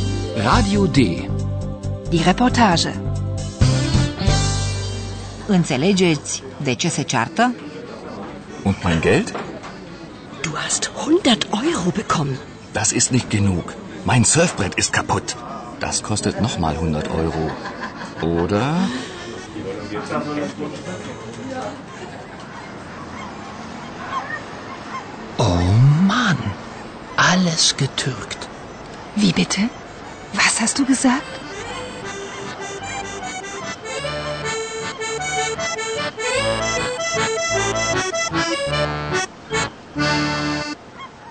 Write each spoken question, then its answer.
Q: Înțelegeți de ce se ceartă?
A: se ceartă pentru bani.